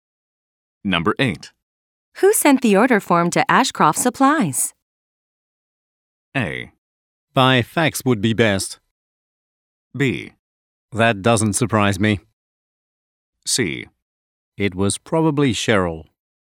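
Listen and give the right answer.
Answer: C: It was probably Cheryl.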